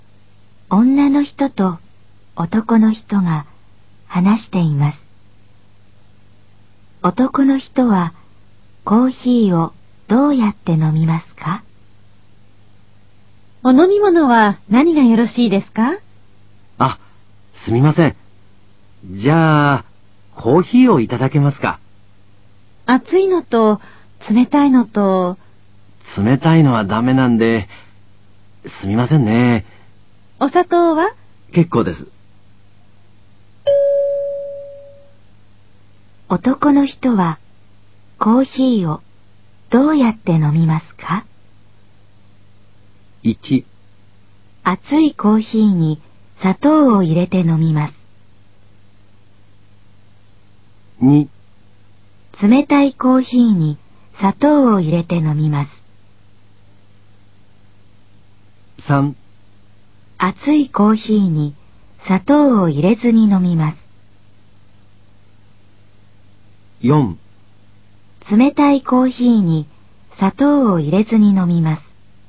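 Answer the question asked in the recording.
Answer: 3: 熱いコーヒーに砂糖を入れずに飲みます。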